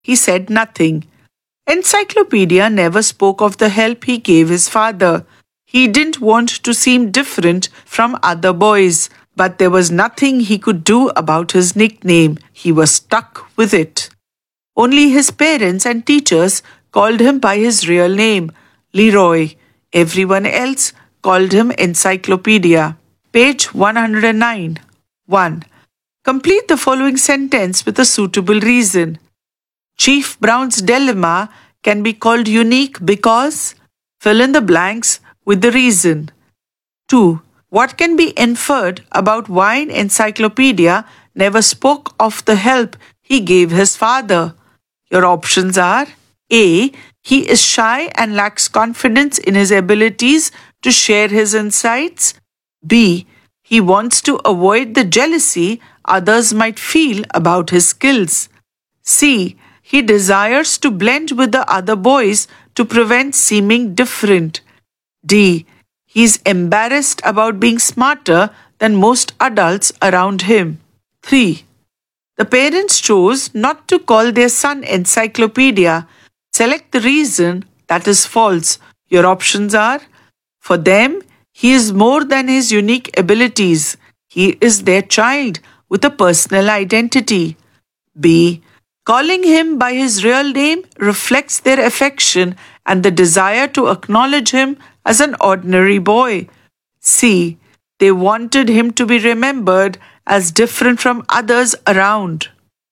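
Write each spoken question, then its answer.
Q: What can be inferred about why Encyclopedia never spoke of the help he gave his father?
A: C: He desires to blend with the other boys to prevent seeming different.

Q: The parents chose not to call their son Encyclopedia.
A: C: They wanted him to be remembered as different from others around.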